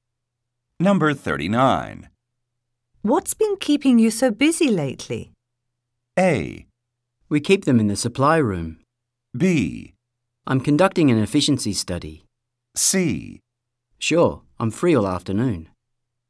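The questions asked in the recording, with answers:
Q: What's been keeping you so busy lately?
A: B: I'm conducting an efficiency study.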